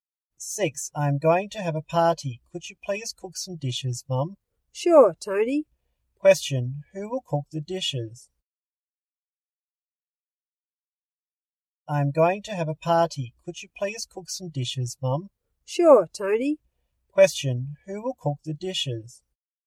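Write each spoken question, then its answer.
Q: Question, who will cook the dishes?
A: Tony's mum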